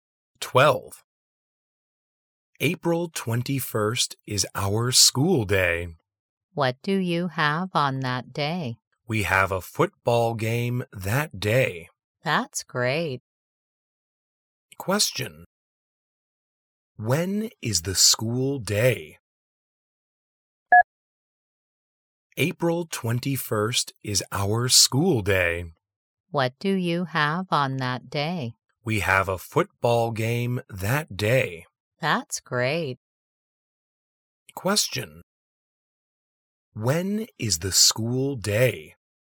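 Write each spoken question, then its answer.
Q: When is the school day?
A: April 21st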